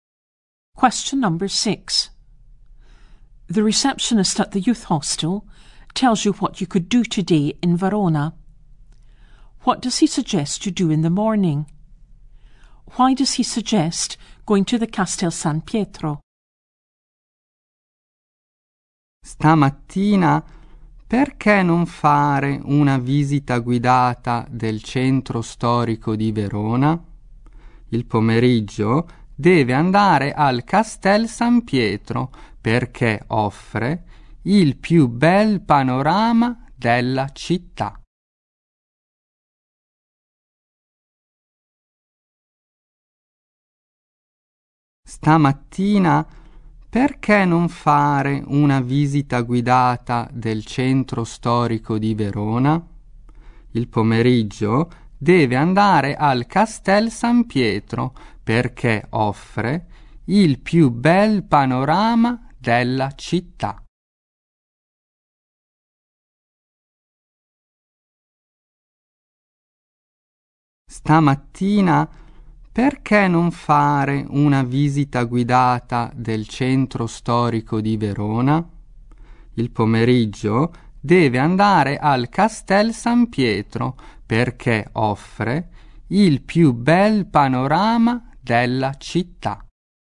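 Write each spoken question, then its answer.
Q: What does he suggest you do in the morning?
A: A guided tour of Verona's historic centre

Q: Why does he suggest going to the Castel San Pietro?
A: It has the best view of the city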